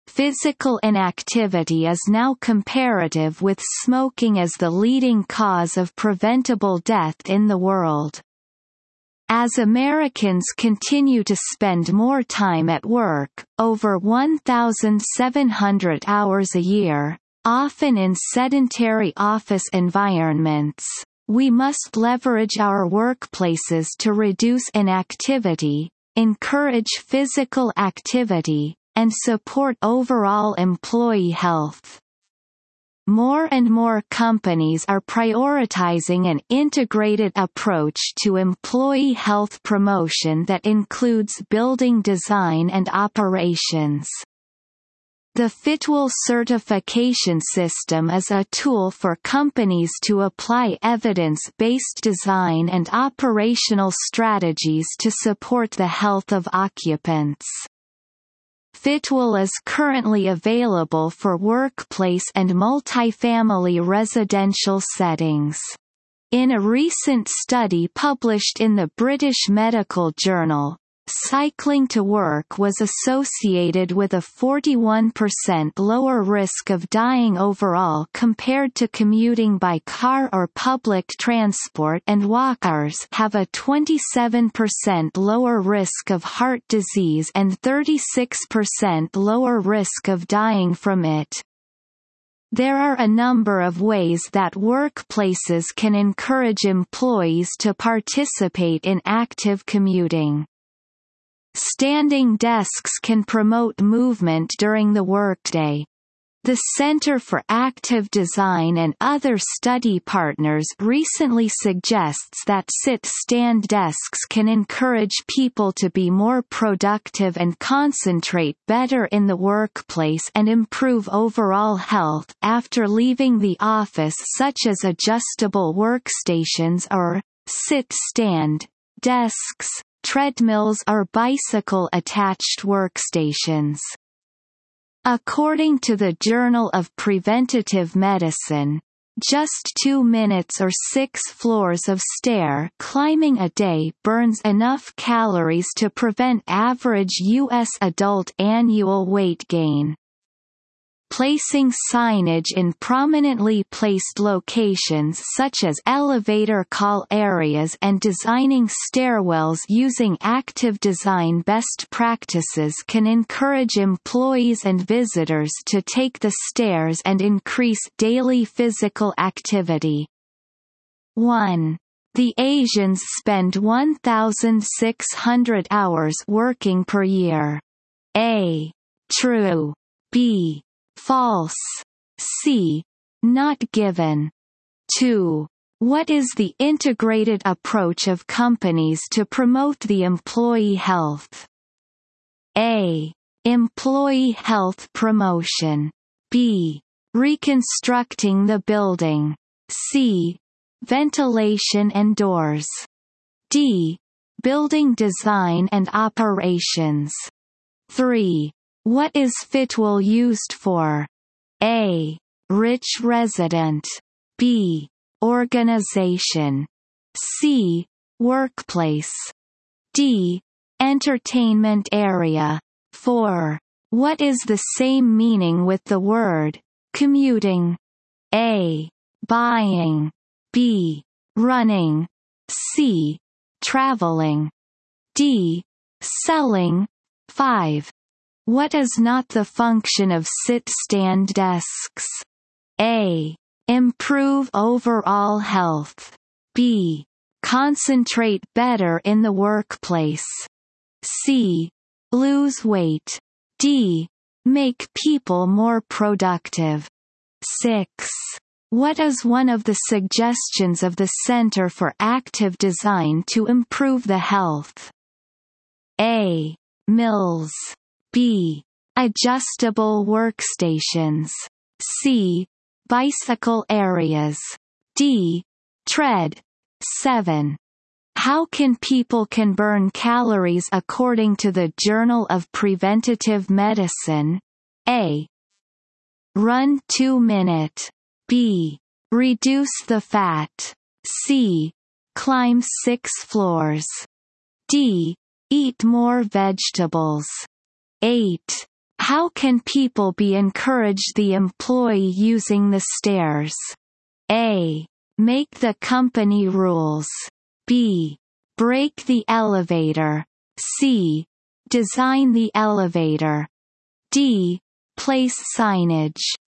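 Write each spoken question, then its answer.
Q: What is the integrated approach of companies to promote the employee health?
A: D: Building design and operations

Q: What is Fitwel used for?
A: C: Workplace

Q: What is the same meaning with the word commuting?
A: C: Traveling

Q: What is not the function of sit-stand desks?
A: C: Lose weight

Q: What is one of the suggestions of the Center for Active Design to improve the health?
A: B: Adjustable workstations

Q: How can people can burn calories according to the Journal of Preventative Medicine?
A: C: Climb 6 floors

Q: How can people be encouraged the employee using the stairs?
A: D: Place signage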